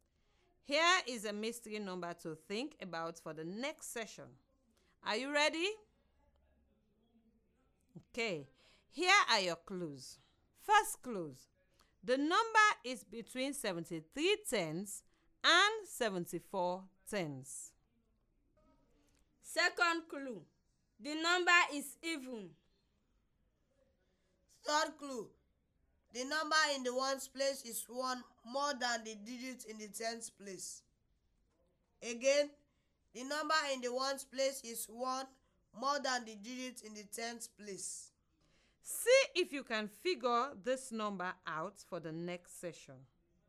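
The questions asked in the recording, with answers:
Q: See if you can figure this number out for the next session.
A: 734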